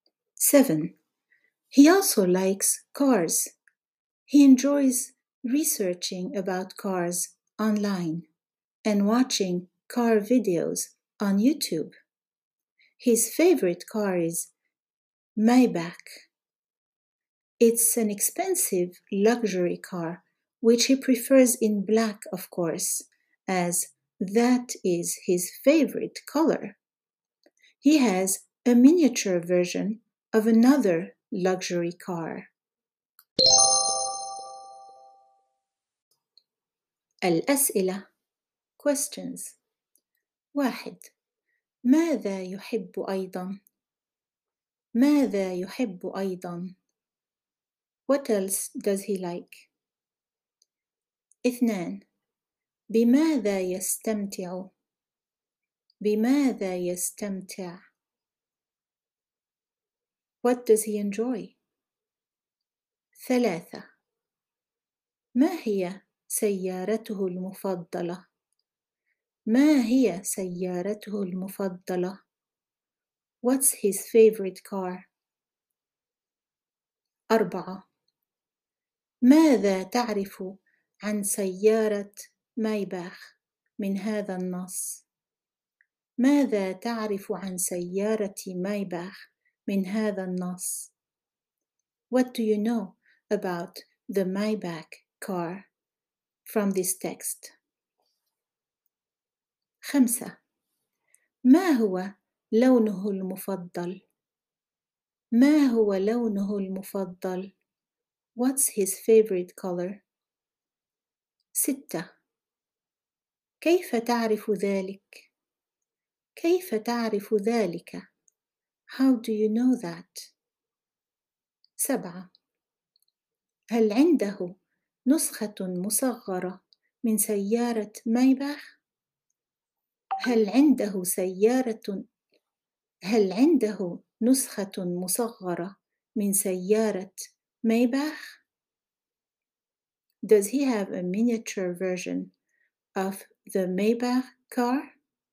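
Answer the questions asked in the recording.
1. السيارات
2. بالبحث عن السيارات على الإنترنت ومشاهدة فيديوهات السيارات على يوتيوب
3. مايباخ
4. إنها سيارة فاخرة غالية
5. الأسود
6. لأنه يفضل سيارة مايباخ باللون الأسود لأنه لونه المفضل
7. لا، عنده نسخة مصغرة من سيارة فاخرة أخرى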